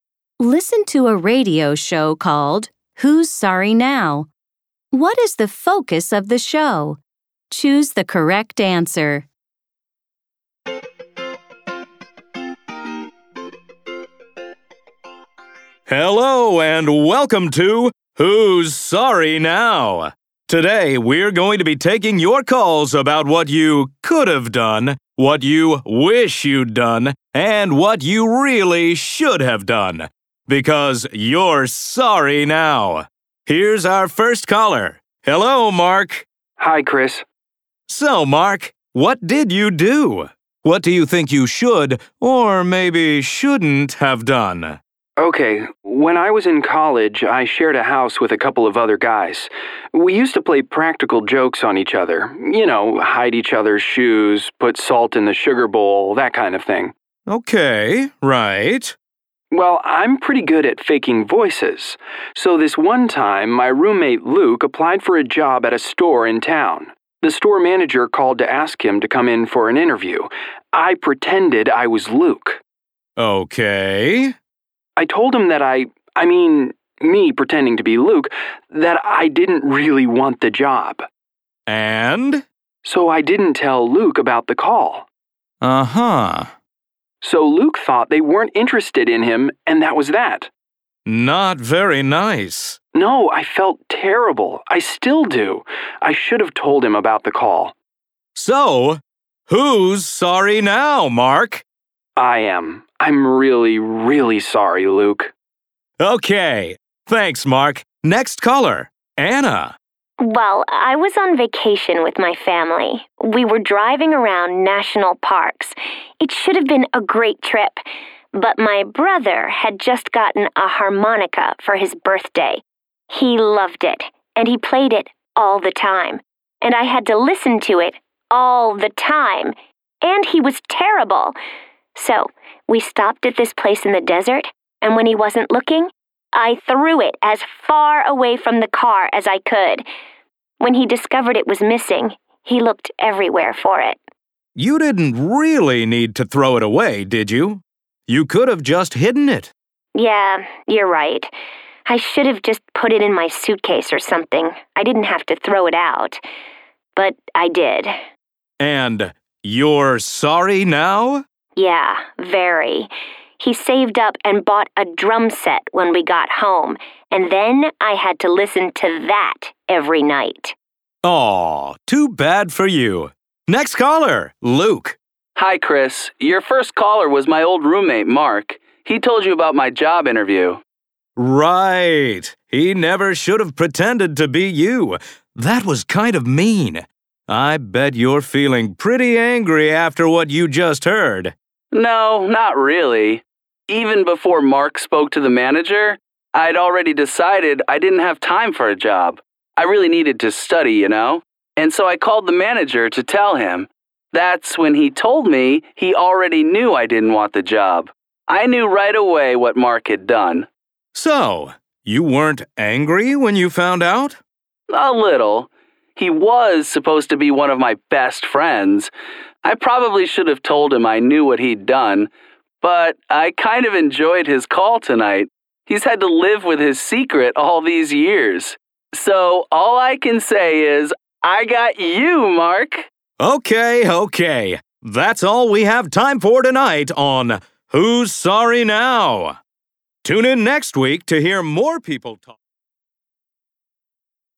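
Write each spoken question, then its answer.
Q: What is the focus of the show?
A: Callers talk about things they regret doing and wish they had done differently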